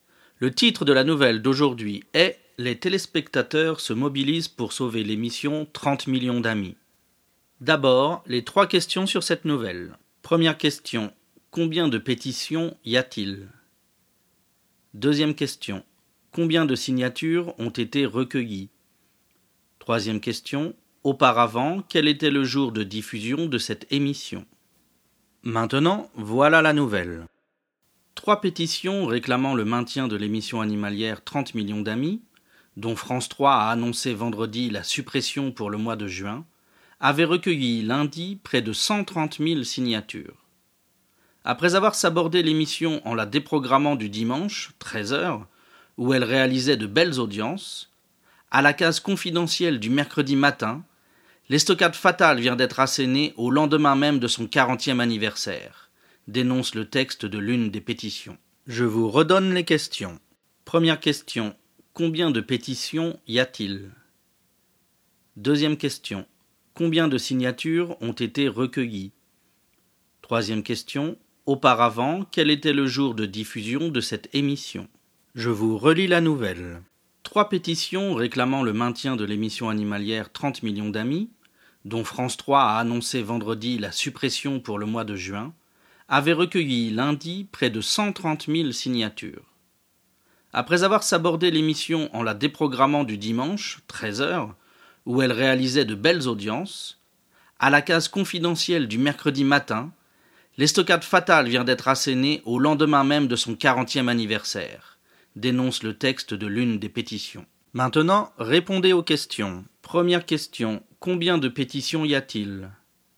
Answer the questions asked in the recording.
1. Réponse, il y a trois pétitions.
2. Réponse, 130 000 signatures ont été recueillies.
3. Réponse, c'était le dimanche.